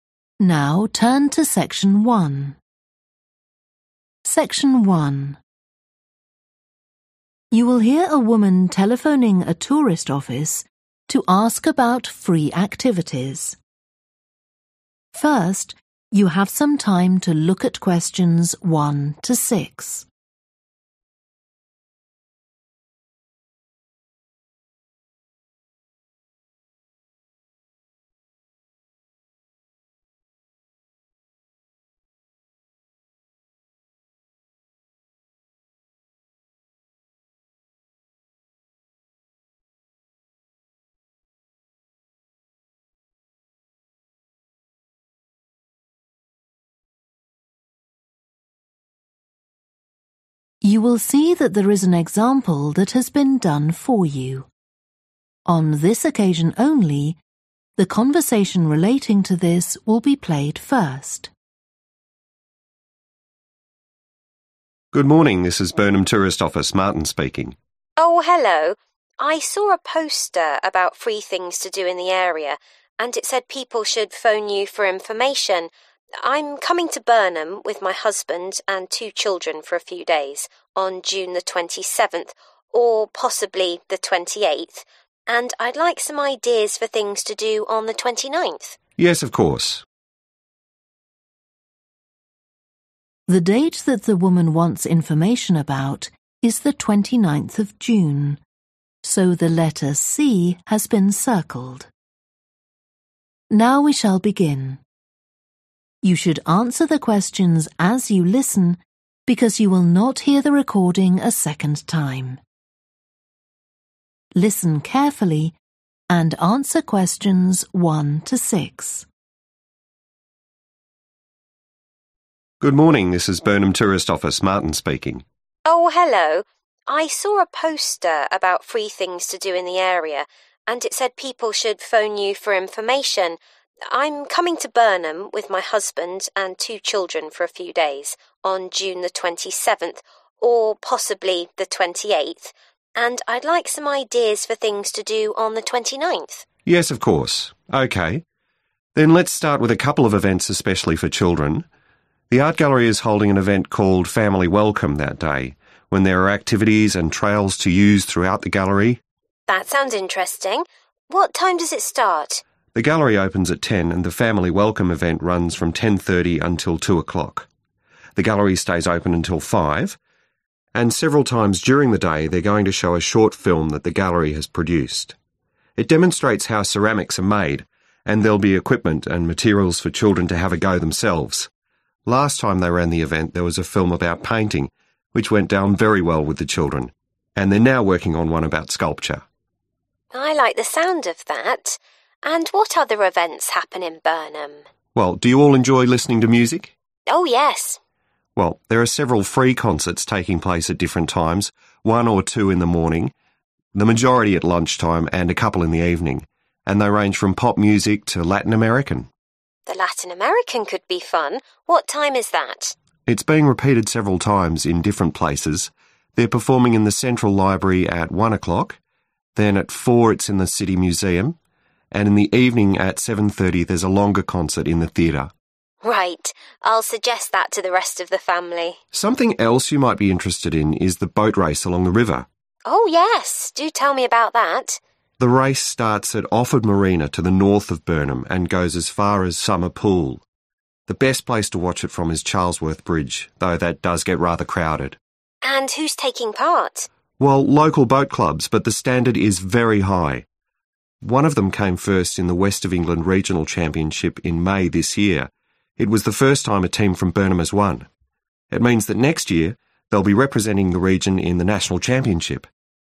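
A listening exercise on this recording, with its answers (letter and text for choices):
Choose the correct letter, A, B or C.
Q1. The 'Family Welcome' event in the art gallery begins at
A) 10 am.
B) 10.30 am.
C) 2 pm.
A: B) 10.30 am.

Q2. The film that is now shown in the 'Family Welcome' event is about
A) sculpture.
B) painting.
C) ceramics.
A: C) ceramics.

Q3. When do most of the free concerts take place?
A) in the morning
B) at lunchtime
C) in the evening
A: B) at lunchtime

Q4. Where will the 4 pm concert of Latin American music take place?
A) in a museum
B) in a theatre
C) in a library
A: A) in a museum

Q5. The boat race begins at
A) Summer Pool.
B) Charlesworth Bridge.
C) Offord Marina.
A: C) Offord Marina.

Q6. One of the boat race teams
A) won a regional competition earlier this year.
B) has represented the region in a national competition.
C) has won several regional competitions.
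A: A) won a regional competition earlier this year.

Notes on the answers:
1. The gallery opens at 10, and the 'Family Welcome' event runs from 10.30 until 2 o'clock (sự kiện 'Chào đón gia đình' diễn ra từ 10:30 sáng đến 2 giờ chiều)
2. And several times during the day, they're going to show a short film that the gallery has produced. It demonstrates how ceramics are made (họ sẽ chiếu một đoạn phim ngắn của triển lãm. Nó cho thấy cách người ta làm gốm sứ), and there'll be equipment and materials for children to have a go themselves.
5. The race starts at Offord Marina (Cuộc đua xuất phát từ bến du thuyền Offord), to the north of Burnham, and goes as far as Summer Pool.
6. One of them came first in the West of England regional championship in May this year (Một trong số họ đã về nhất ở giải vô địch khu vực miền Tây nước Anh vào tháng 5 năm nay) – it was the first time a team from Burnham has won.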